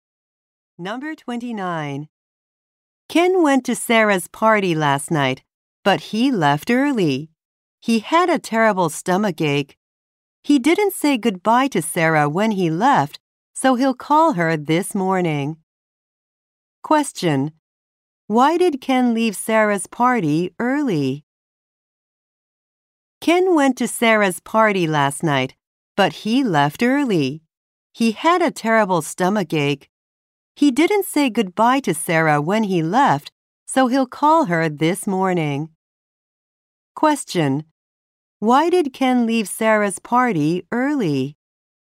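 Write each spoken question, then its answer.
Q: Why did Ken leave Sarah's party early?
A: He had a stomach ache.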